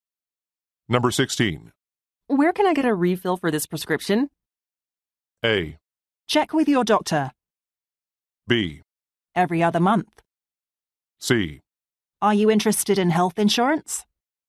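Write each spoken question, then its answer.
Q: Where can I get a refill for this prescription?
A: A: Check with your doctor.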